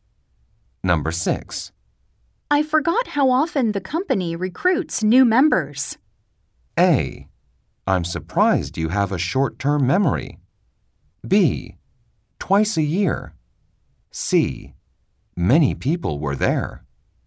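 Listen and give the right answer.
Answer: B: Twice a year.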